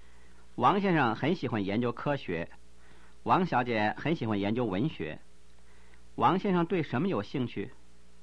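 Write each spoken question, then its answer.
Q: 王先生对什么有兴趣?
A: 科学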